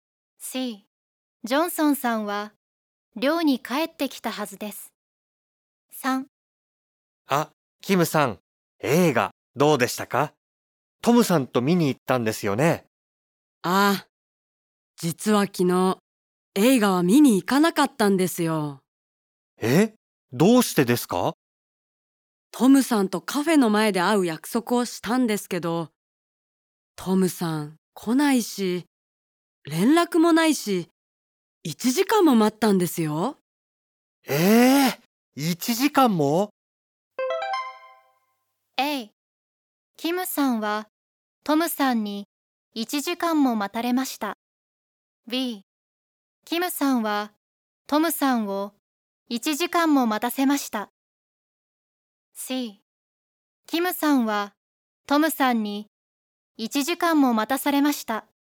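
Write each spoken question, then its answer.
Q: A、キムさんはトムさんに1時間も待たれました。B、キムさんはトムさんを1時間も待たせました。C、キムさんはトムさんに1時間も待たされました。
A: C: キムさんはトムさんに1時間も待たされました。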